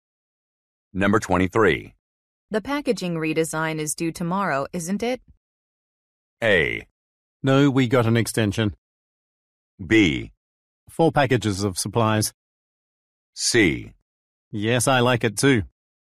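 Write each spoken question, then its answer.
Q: The packaging redesign is due tomorrow, isn't it?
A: A: No, we got an extension.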